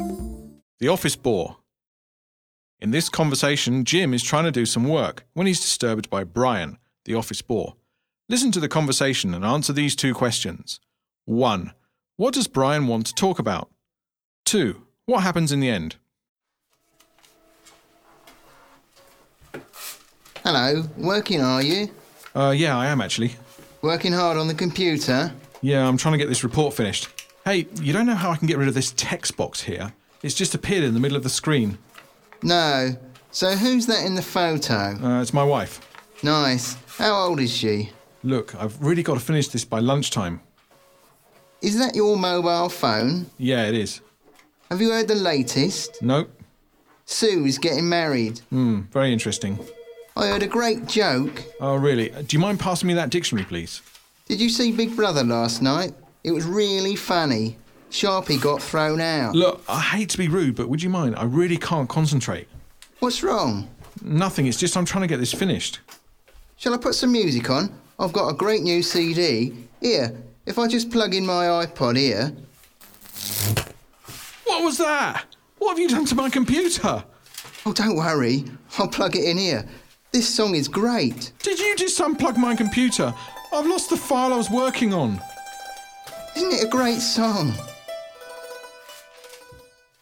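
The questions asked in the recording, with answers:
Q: What does Brian want to talk about?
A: Lots of trivial things: Jim's wife's photo, his mobile, office gossip (Sue's getting married), a joke, Big Brother, and music

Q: What happens in the end?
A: Brian unplugs Jim's computer to plug in his iPod, and Jim loses the file he was working on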